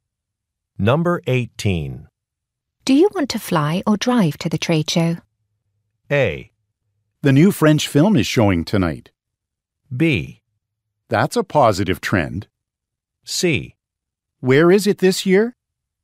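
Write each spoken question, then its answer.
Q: Do you want to fly or drive to the trade show?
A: C: Where is it this year?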